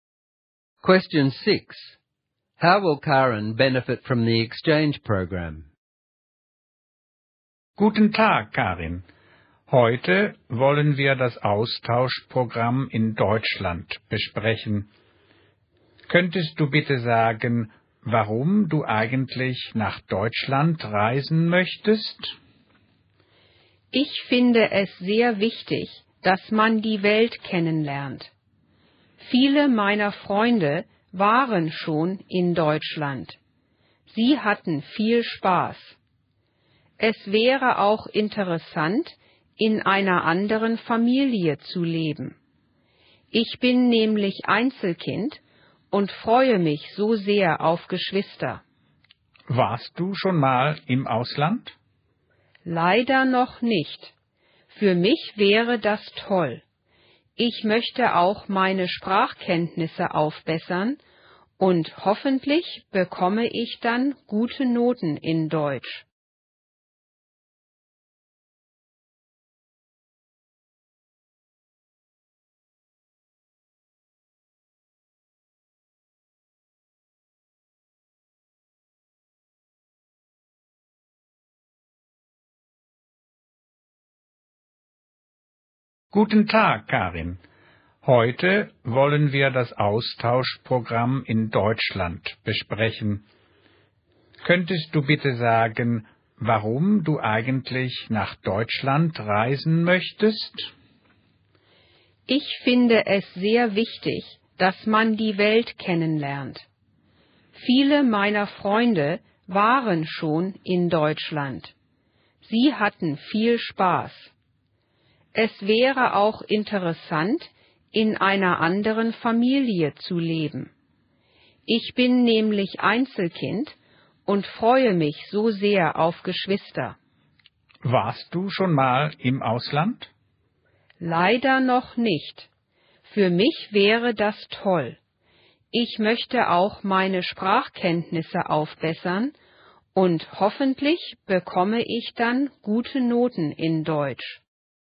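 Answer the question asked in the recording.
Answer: She gets to see the world/go abroad for the first time, live with another family and have siblings, and improve her German and her marks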